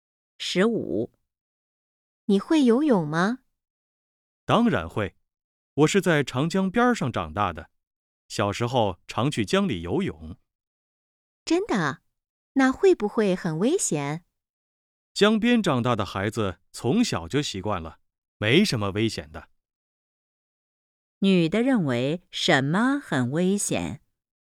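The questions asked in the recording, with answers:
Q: 女的认为什么很危险?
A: 在江里游泳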